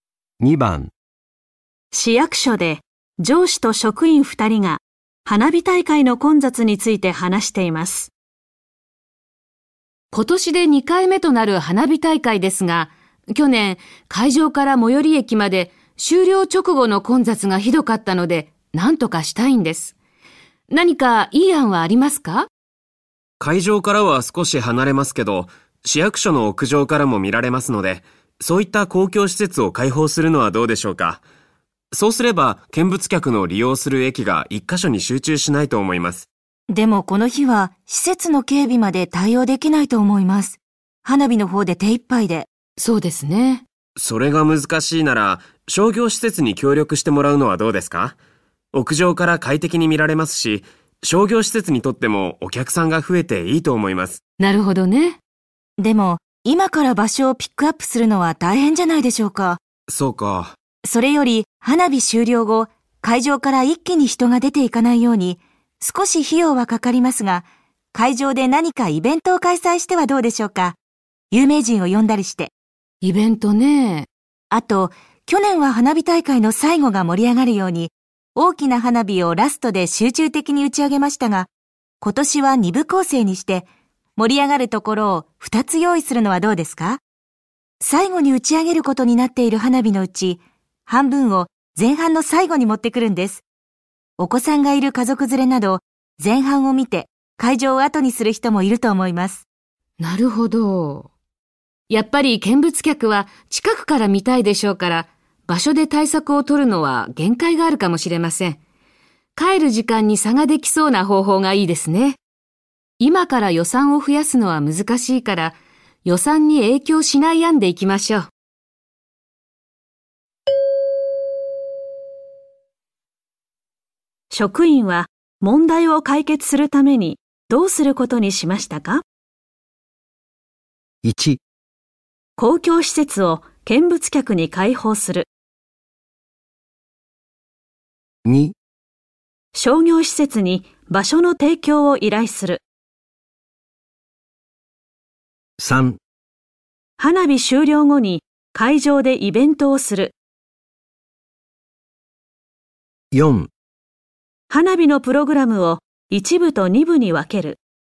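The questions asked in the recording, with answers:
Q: 職員は問題を解決するためにどうすることにしましたか?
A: 4: 花火のプログラムを1部と2部に分ける。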